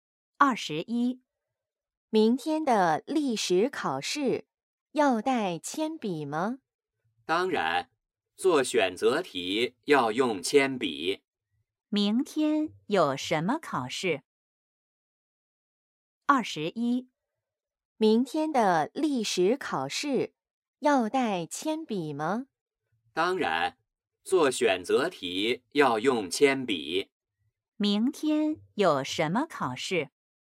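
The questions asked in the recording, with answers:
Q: 明天有什么考试?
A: 历史考试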